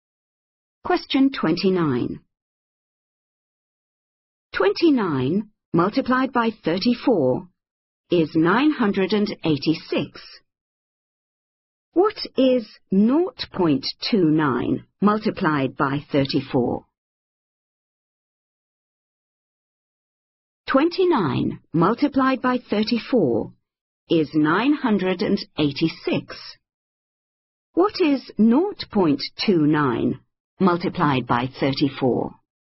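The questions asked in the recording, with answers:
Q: What is 0.29 multiplied by 34?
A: 9.86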